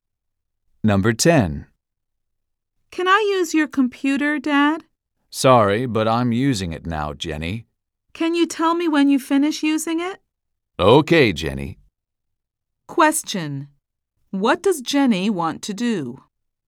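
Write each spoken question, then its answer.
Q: What does Jenny want to do?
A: Use her dad's computer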